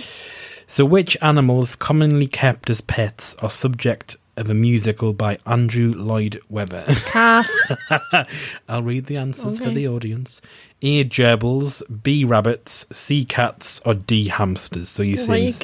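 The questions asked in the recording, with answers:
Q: So which animals commonly kept as pets are subject of a musical by Andrew Lloyd Webber?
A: C: Cats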